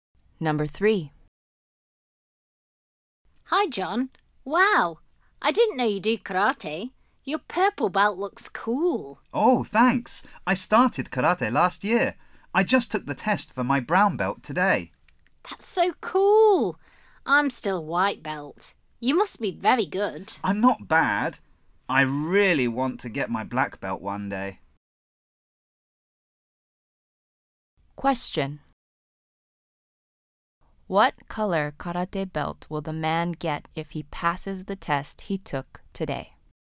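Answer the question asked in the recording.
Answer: Brown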